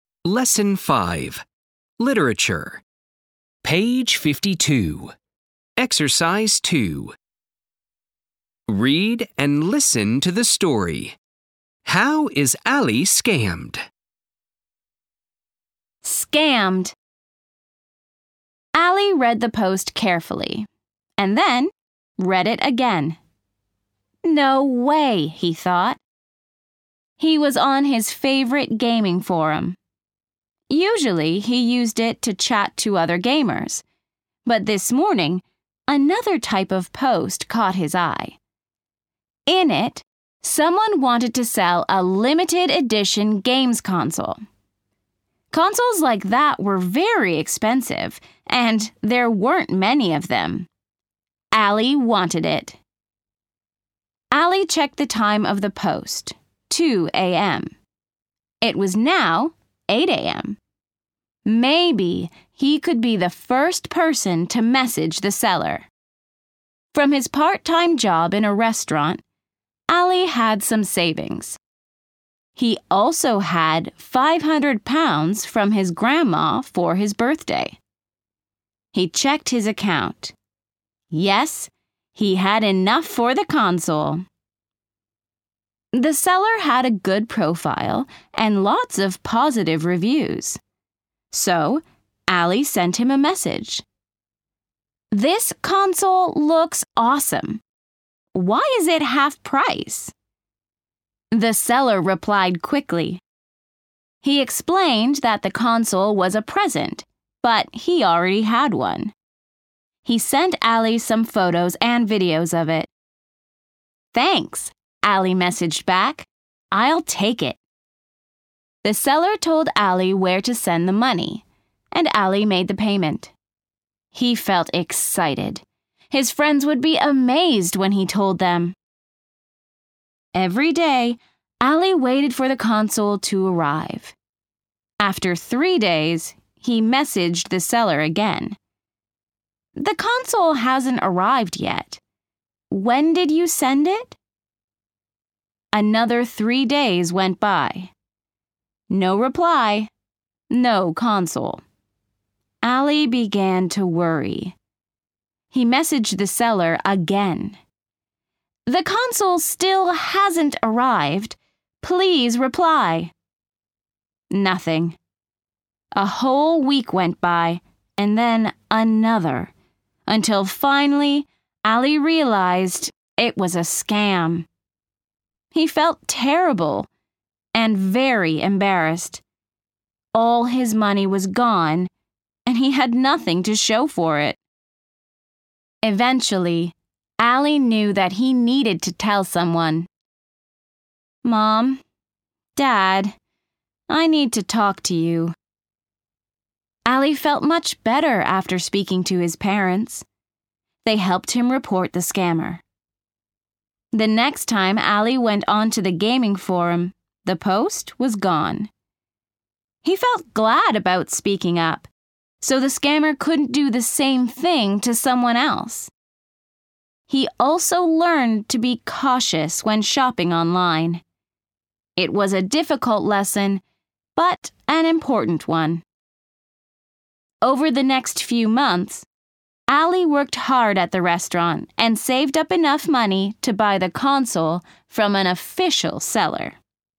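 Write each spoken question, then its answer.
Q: How is Ali scammed?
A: He pays a seller on a gaming forum for a half-price games console, but the console never arrives.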